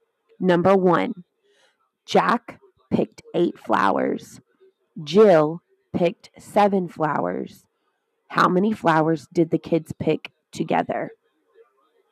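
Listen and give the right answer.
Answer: 15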